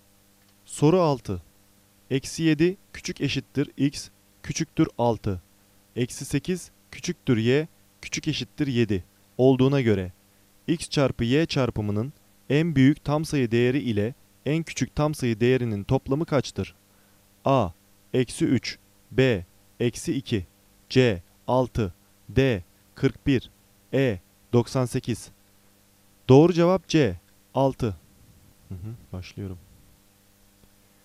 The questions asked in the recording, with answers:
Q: Eksi 7 küçük eşittir X küçüktür 6 Eksi 8 küçüktür Y küçük eşittir 7 olduğuna göre X çarpı Y çarpımının en büyük tam sayı değeri ile en küçük tam sayı değerinin toplamı kaçtır?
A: Doğru cevap C 6